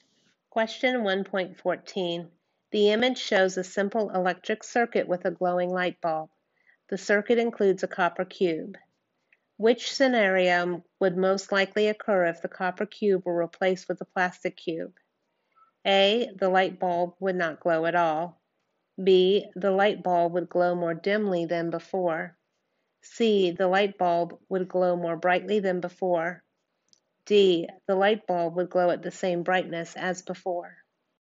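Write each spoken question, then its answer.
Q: Which scenario would most likely occur if the copper cube were replaced with a plastic cube?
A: A: The light bulb would not glow at all.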